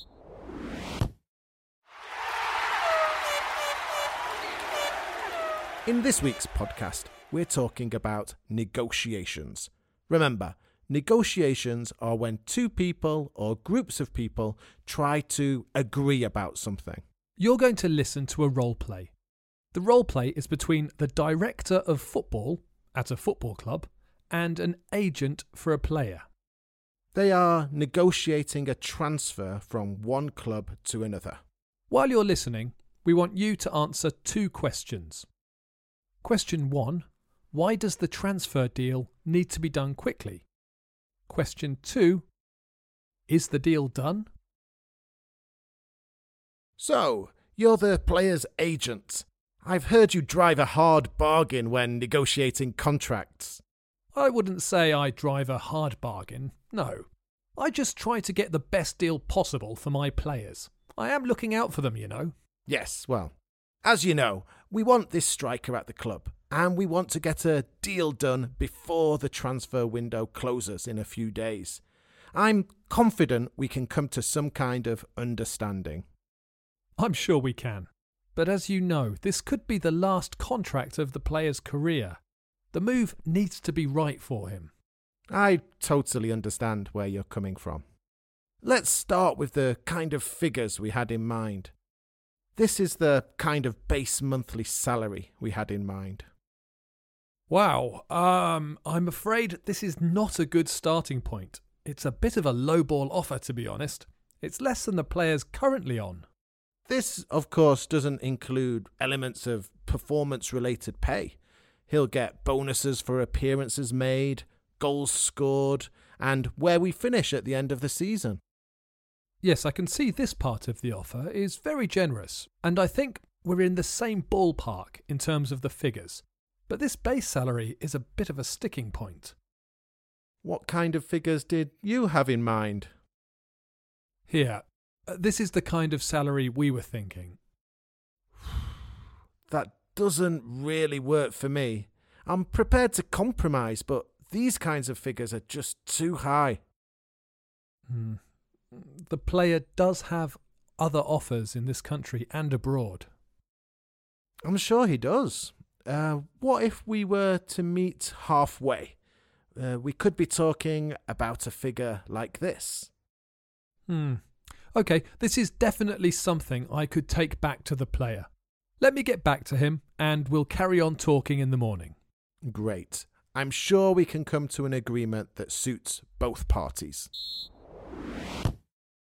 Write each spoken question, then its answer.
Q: why does the transfer deal need to be done quickly?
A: The answer is that the transfer window closes in a few days, and clubs can only buy players when the transfer window is open.

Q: is the deal done?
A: The answer is no, but negotiations have progressed, and they will continue the following day.